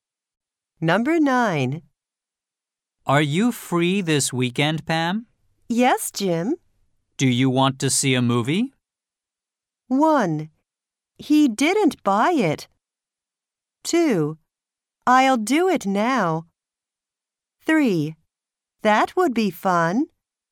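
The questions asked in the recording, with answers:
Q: Do you want to see a movie?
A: 3: That would be fun.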